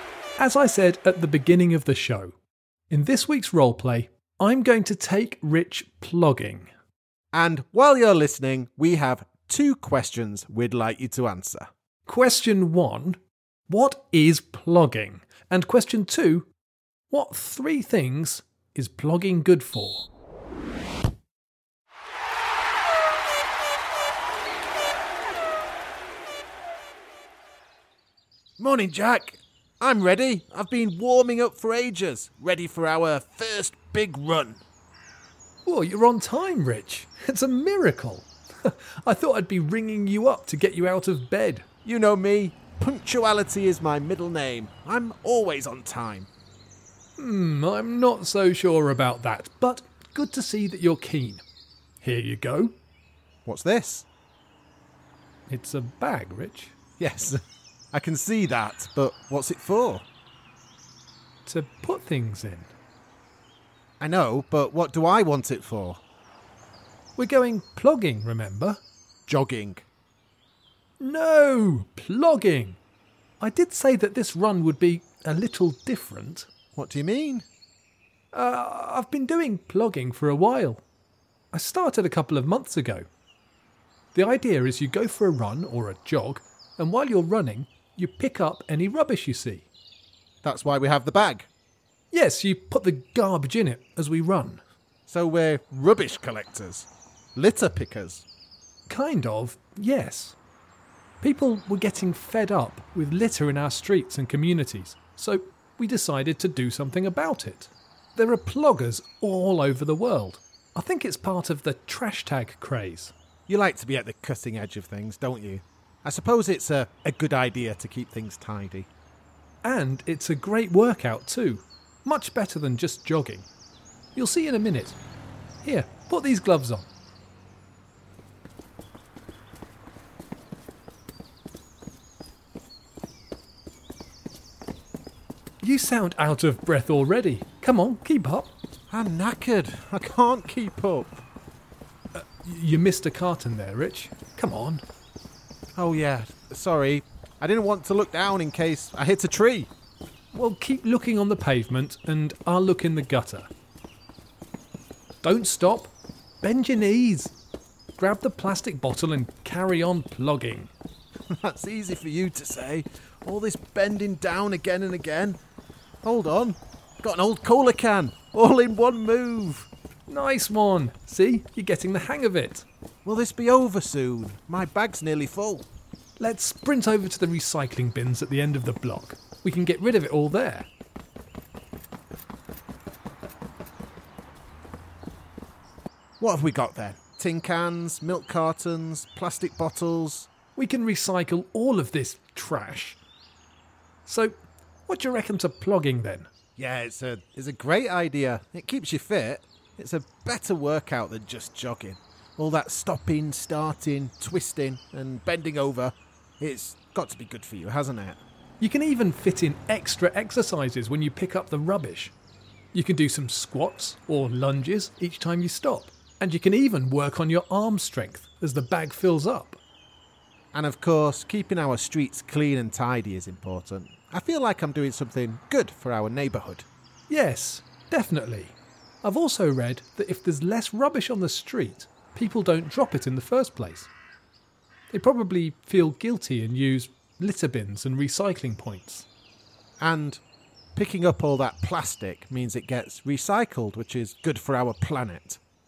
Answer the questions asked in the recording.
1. The answer is a mixture of running and collecting rubbish on the streets.
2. In brief, the answers are our fitness, keeping our local area tidy, and our planet.